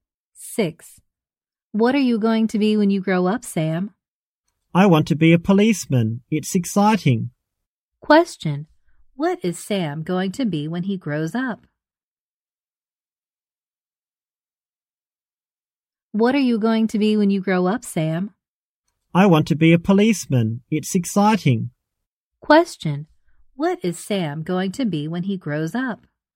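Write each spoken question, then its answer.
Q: What is Sam going to be when he grows up?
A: A policeman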